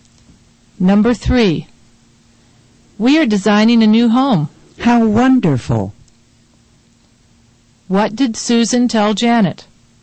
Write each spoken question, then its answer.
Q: What did Susan tell Janet?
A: She told Janet they were designing a new home.